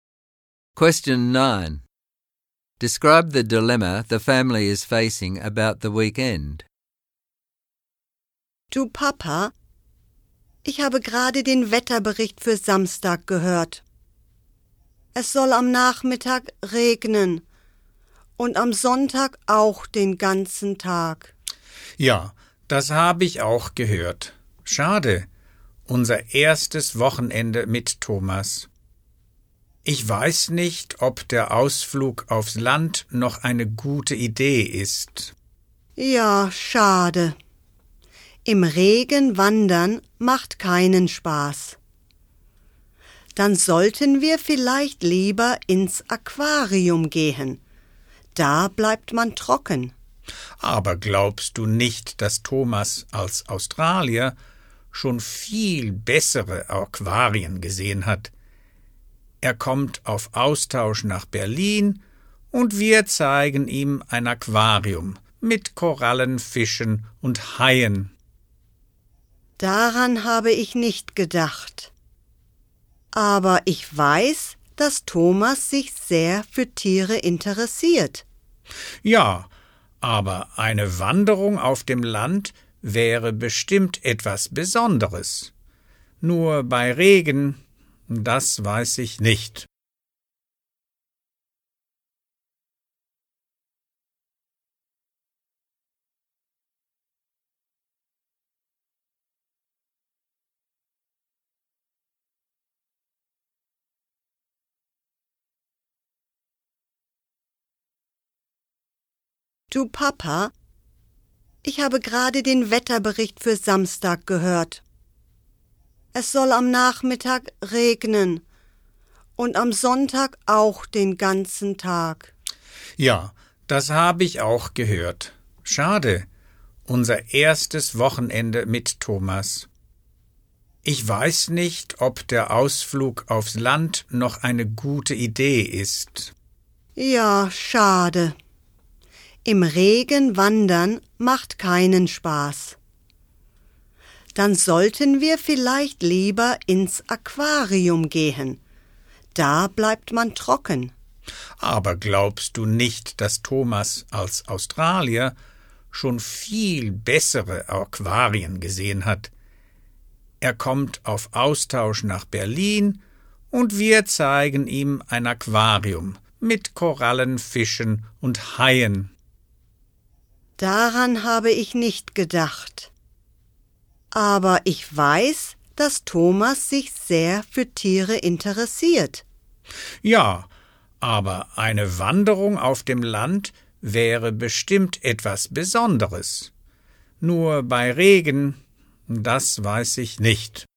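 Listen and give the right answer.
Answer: Rain is forecast, so a hike in the country with their exchange guest Thomas is not fun; the aquarium stays dry but as an Australian Thomas has probably seen better ones, though he likes animals.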